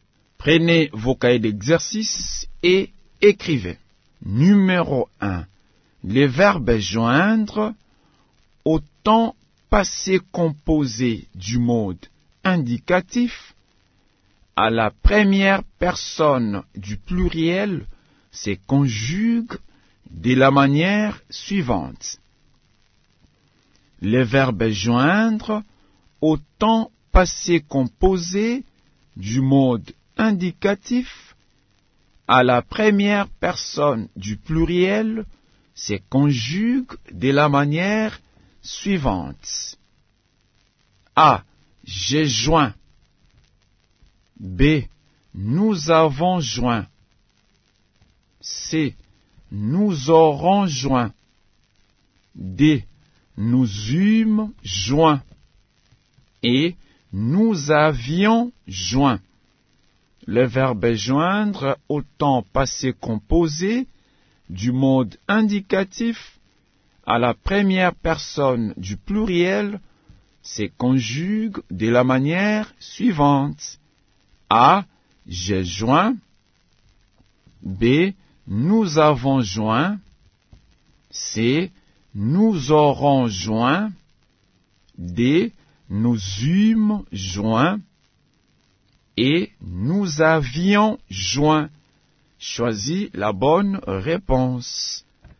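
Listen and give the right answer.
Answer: B: Nous avons joint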